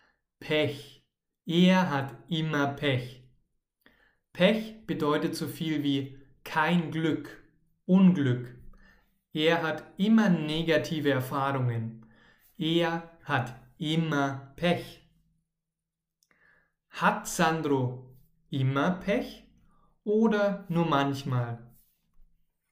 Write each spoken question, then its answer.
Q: Hat Sandro immer Pech oder nur manchmal?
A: Immer. Er hat immer Pech.